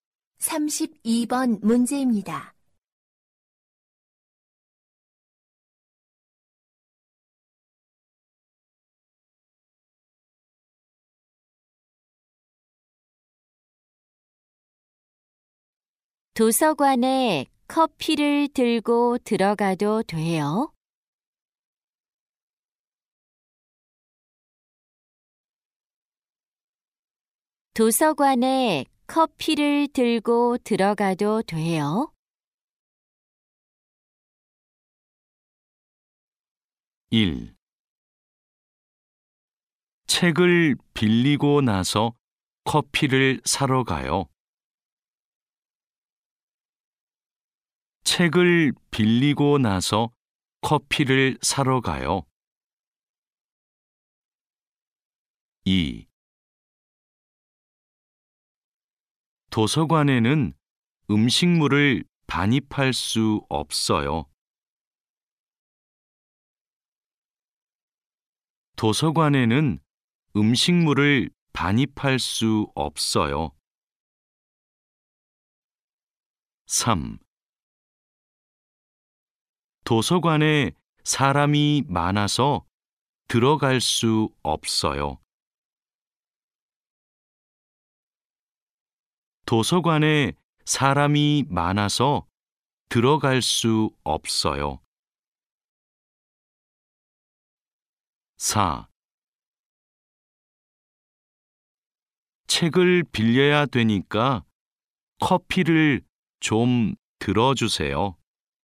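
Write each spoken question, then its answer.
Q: 도서관에 커피를 들고 들어가도 돼요?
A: 2: 도서관에는 음식물을 반입할 수 없어요.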